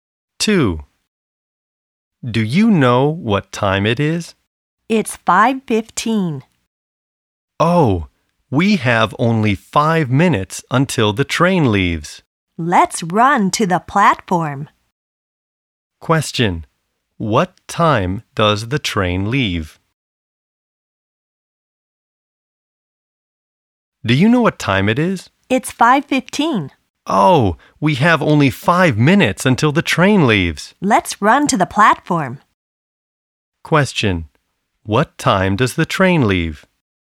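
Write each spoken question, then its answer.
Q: What time does the train leave?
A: 5:20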